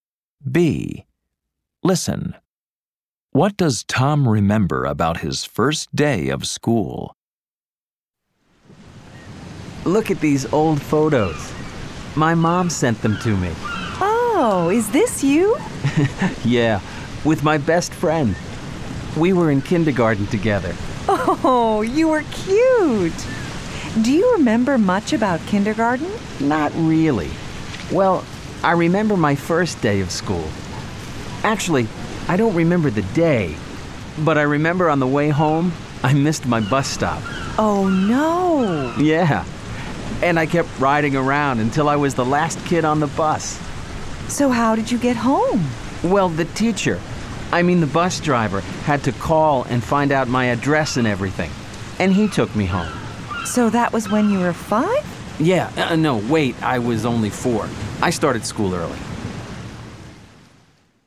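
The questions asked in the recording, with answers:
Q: What does Tom remember about his first day of school?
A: He missed his bus stop on the way home and the bus driver took him home.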